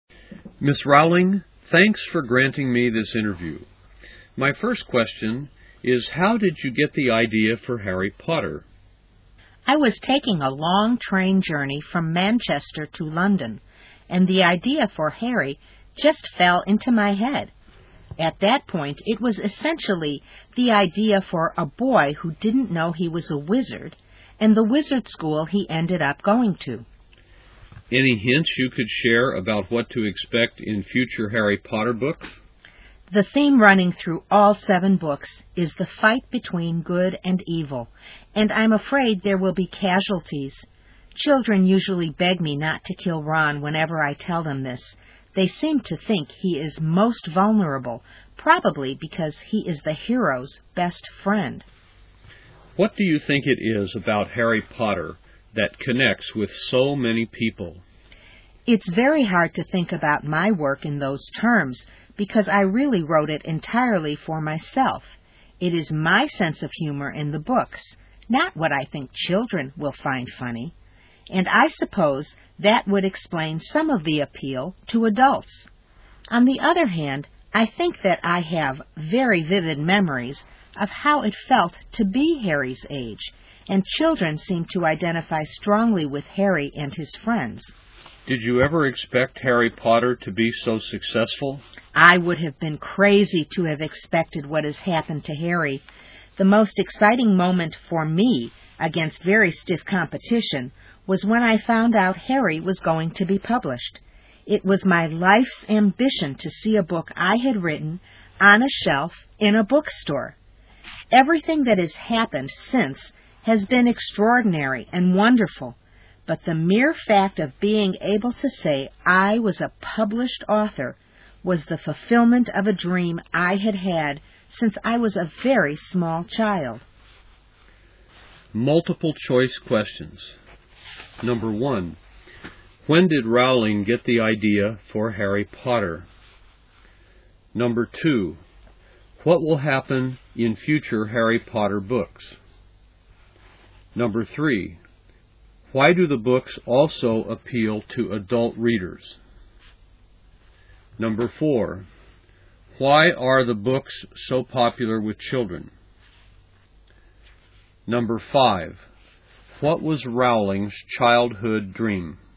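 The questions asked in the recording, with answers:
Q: When did Rowling get the idea for Harry Potter?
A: During a long train journey from Manchester to London

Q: What will happen in future Harry Potter books?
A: There will be casualties in the fight between good and evil

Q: Why do the books also appeal to adult readers?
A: They reflect her own sense of humor, not what she thinks children find funny

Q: Why are the books so popular with children?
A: She vividly remembers being Harry's age, so children identify with Harry and his friends

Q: What was Rowling's childhood dream?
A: To be a published author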